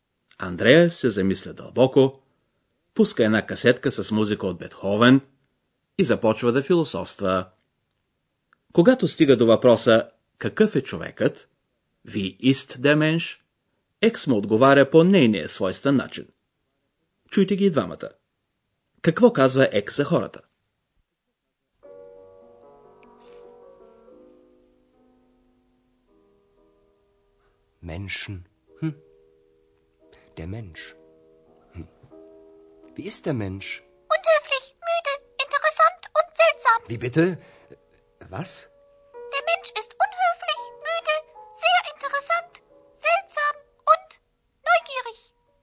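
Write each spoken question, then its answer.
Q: Какво казва Екс за хората?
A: Човекът е неучтив, уморен, много интересен, странен и любопитен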